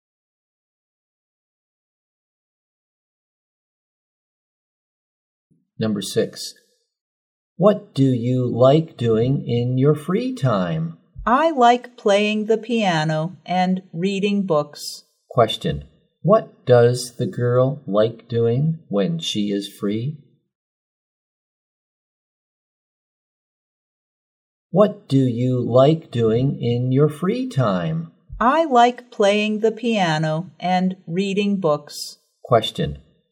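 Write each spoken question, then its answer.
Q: Question, what does the girl like doing when she is free?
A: Playing the piano and reading books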